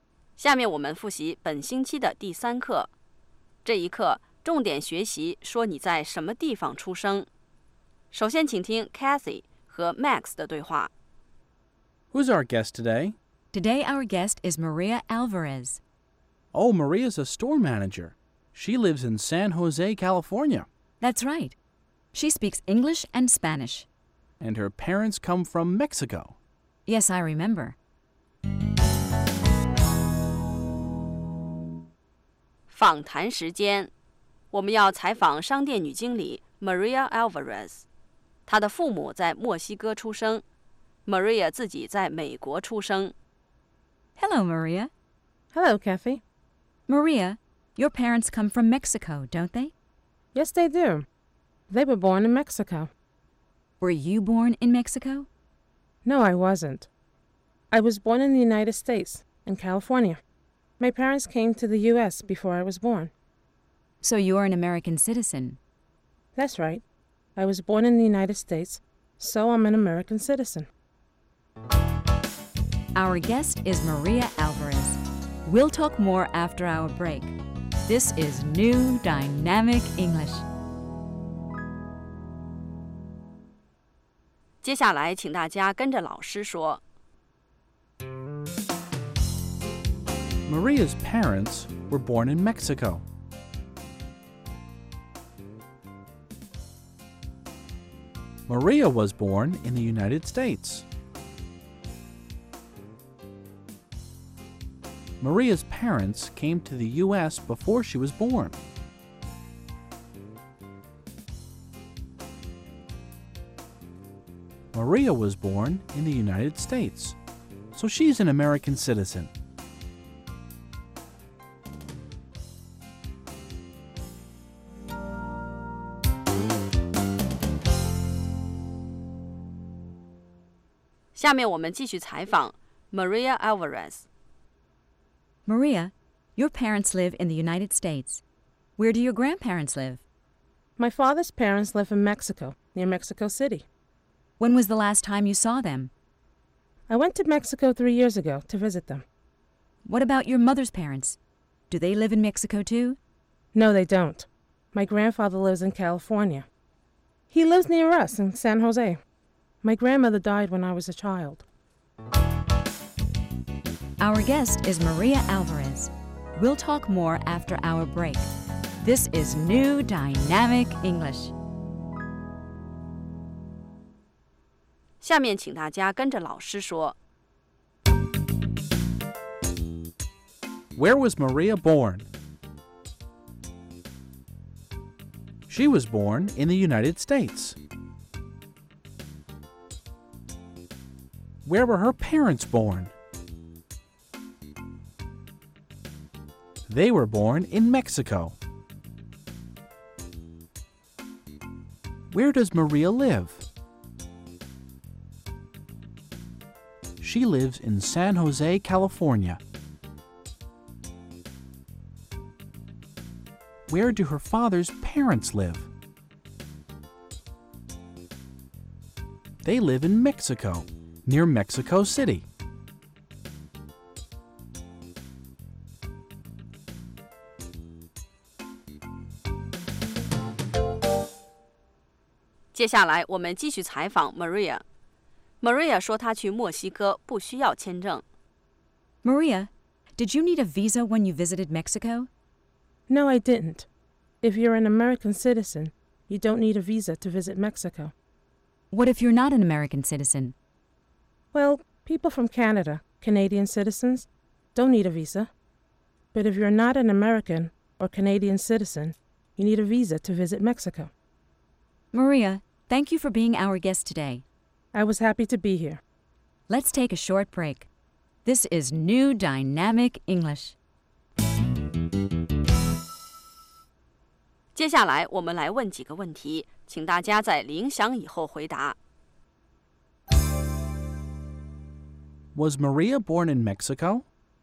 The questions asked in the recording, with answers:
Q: Was Maria born in Mexico?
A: No, she wasn't. She was born in the United States.